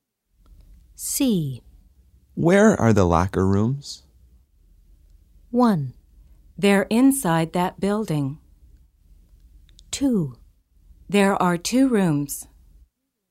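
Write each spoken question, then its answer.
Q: Where are the locker rooms?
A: 1: They're inside that building.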